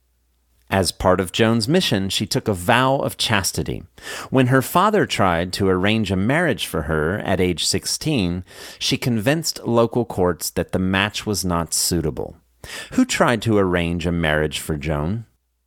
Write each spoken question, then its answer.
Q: Who tried to arrange a marriage for Joan?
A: Her father tried to arrange a marriage for Joan.